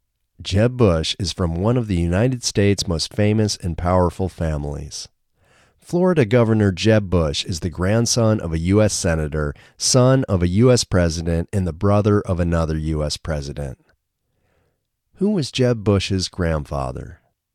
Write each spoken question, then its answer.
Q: Who was Jeb Bush's grandfather?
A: Jeb Bush's grandfather was a U.S.